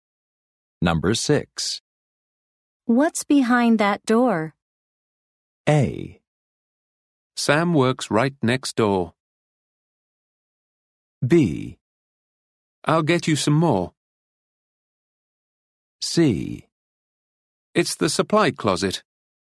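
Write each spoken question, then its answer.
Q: What's behind that door?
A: C: It's the supply closet.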